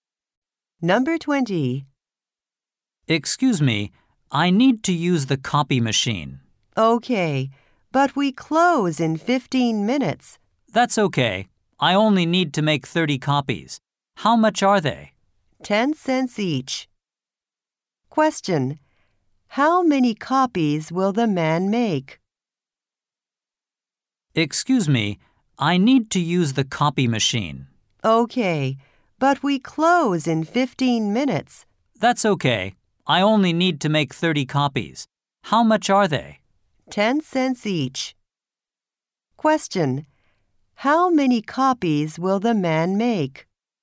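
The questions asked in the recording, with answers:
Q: How many copies will the man make?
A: 30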